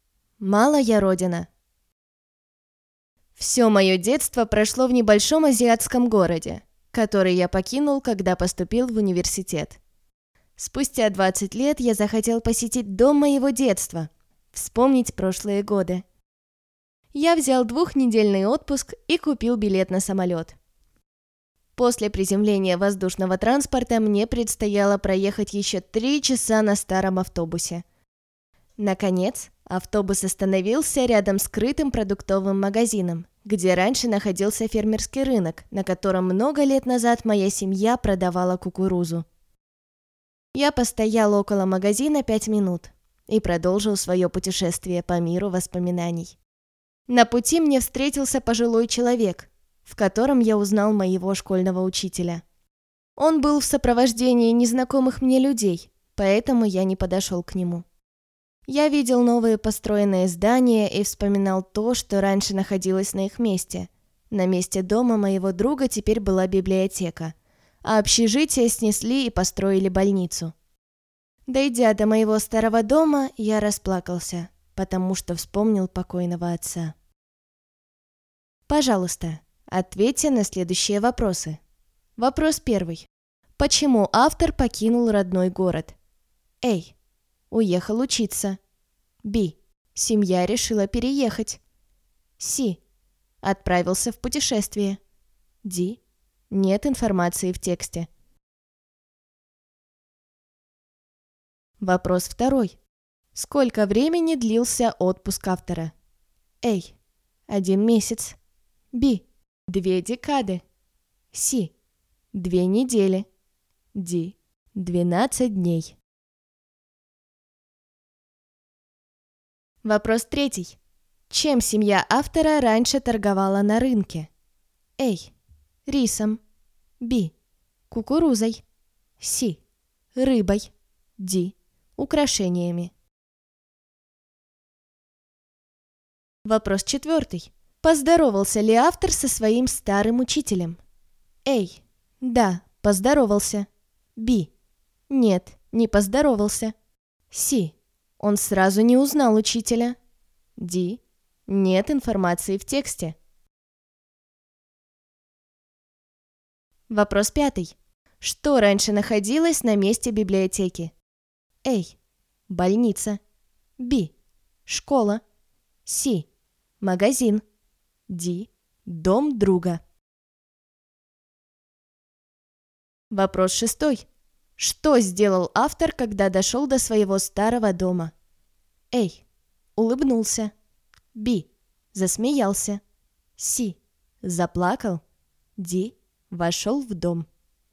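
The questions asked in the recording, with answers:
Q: Почему автор покинул родной город?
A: A: Уехал учиться.

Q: Сколько времени длился отпуск автора?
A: C: 2 недели.

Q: Чем семья автора раньше торговала на рынке?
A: Б: Кукурузой.

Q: Поздоровался ли автор со своим старым учителем?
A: B: Нет, не поздоровался.

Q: Что раньше находилось на месте библиотеки?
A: Д: Дом друга.

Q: Что сделал автор, когда дошел до своего старого дома?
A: С: Заплакал.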